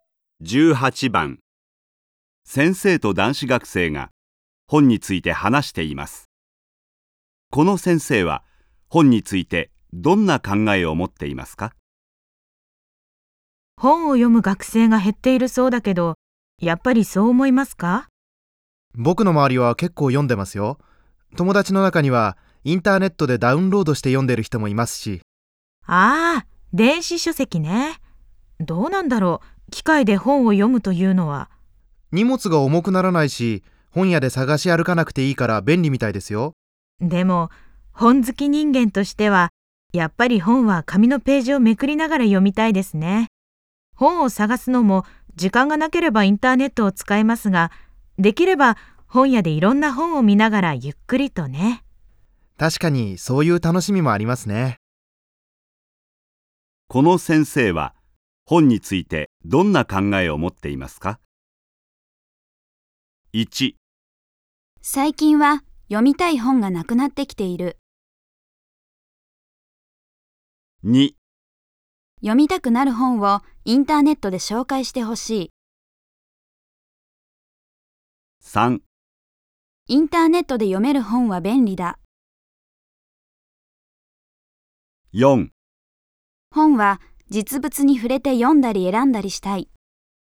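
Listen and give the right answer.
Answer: 4: 本は実物に触れて読んだり選んだりしたい。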